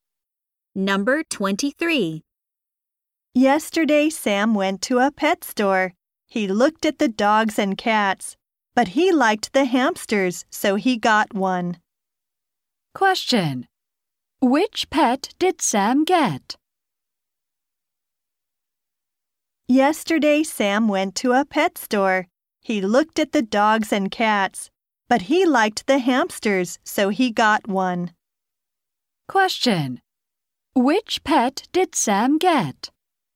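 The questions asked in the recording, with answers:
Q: Which pet did Sam get?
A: A hamster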